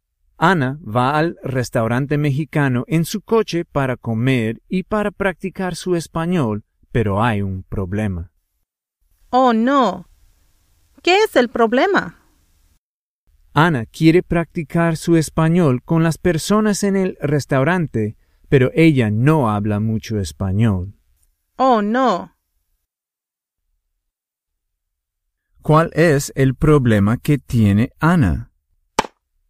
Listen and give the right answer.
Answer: Su problema es que ella quiere hablar en español con las personas en el restaurante, pero ella no habla mucho español.